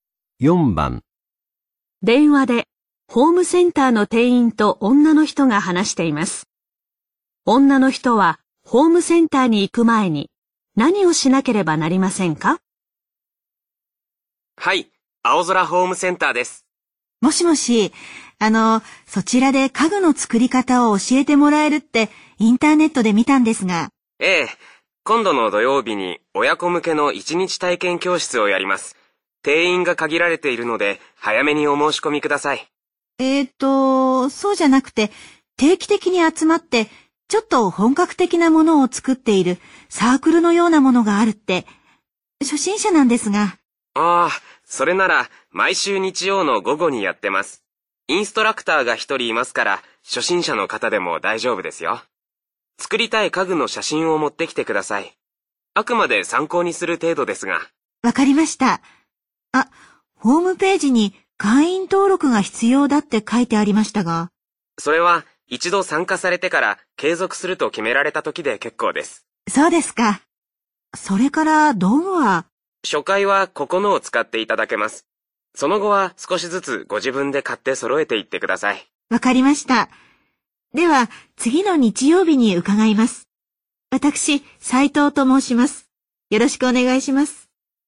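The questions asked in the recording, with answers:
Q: 女の人はホームセンターに行く前に何をしなければなりませんか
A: 作りたい家具の写真を用意する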